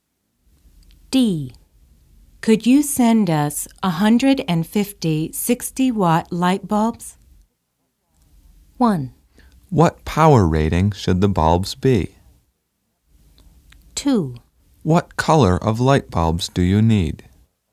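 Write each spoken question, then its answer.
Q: Could you send us 150 60-watt light bulbs?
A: 2: What color of light bulbs do you need?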